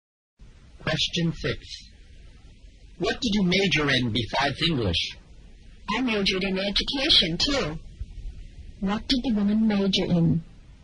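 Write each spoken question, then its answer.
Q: What did the woman major in?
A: English and education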